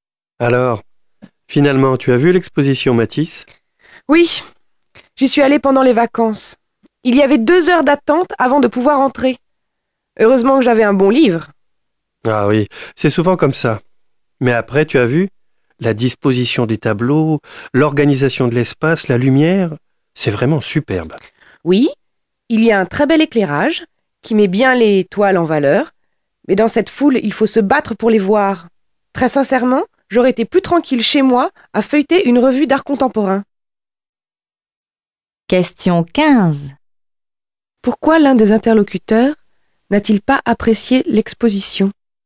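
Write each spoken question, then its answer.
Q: Pourquoi l'un des interlocuteurs n'a-t-il pas apprécié l'exposition?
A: Parce qu'il y avait trop de monde (la foule, deux heures d'attente).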